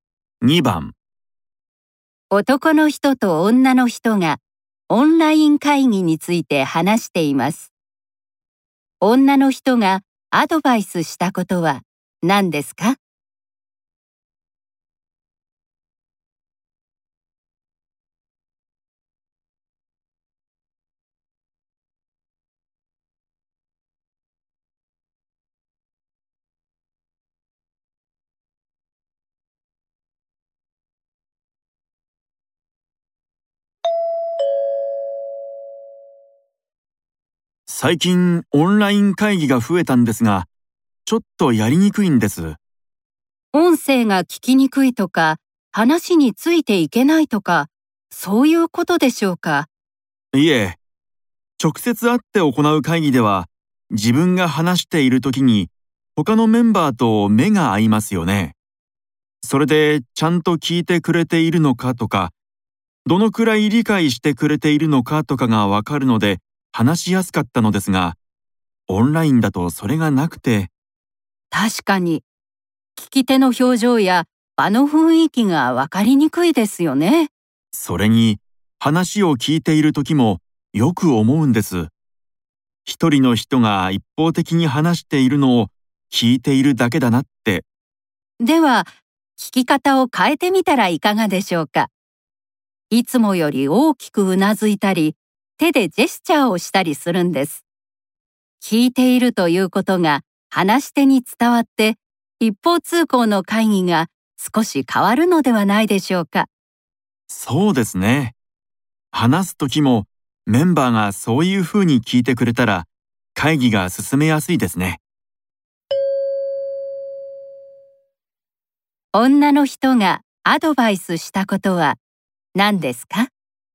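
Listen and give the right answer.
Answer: 聞くときに大きくうなずいたり手でジェスチャーをしたりすること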